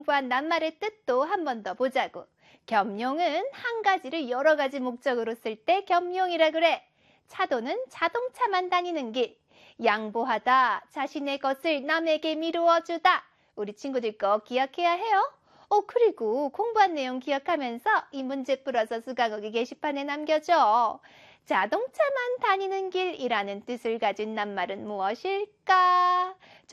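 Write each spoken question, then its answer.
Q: 자동차만 다니는 길이라는 뜻을 가진 낱말은 무엇일까?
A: 차도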